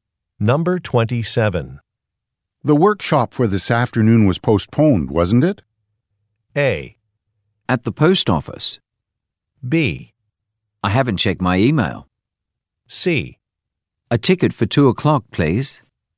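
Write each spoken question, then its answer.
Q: The workshop for this afternoon was postponed, wasn't it?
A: B: I haven't checked my email.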